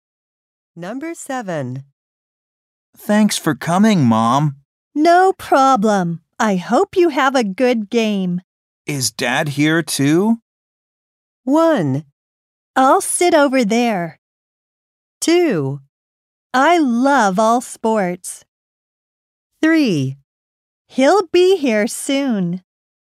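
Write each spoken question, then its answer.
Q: Is Dad here too?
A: 3: He'll be here soon.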